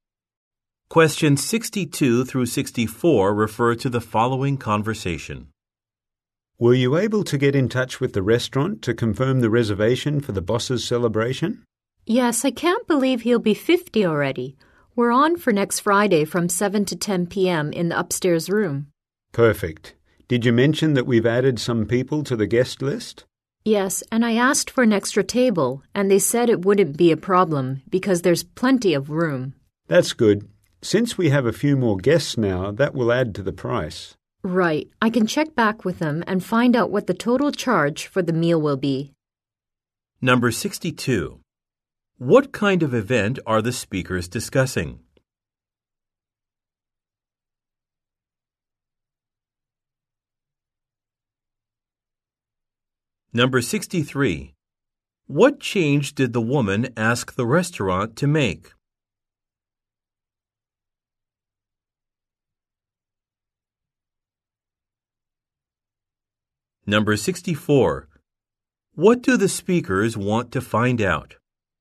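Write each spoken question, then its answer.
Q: What kind of event are the speakers discussing?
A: A birthday celebration for the boss

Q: What change did the woman ask the restaurant to make?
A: Add an extra table

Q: What do the speakers want to find out?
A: The total price of the meal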